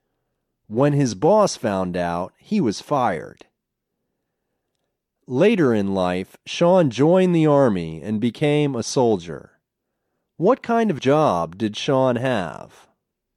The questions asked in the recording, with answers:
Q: What kind of job did Sean have?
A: He was a soldier.